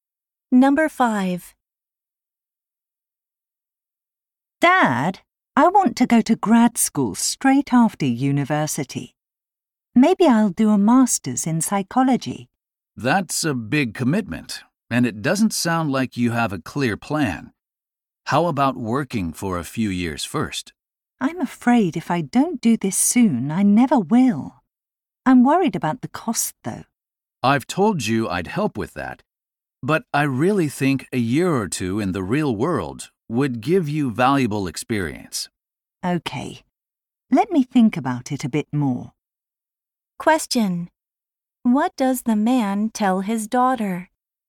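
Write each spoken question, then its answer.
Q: What does the man tell his daughter?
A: She should work for a few years before going to grad school.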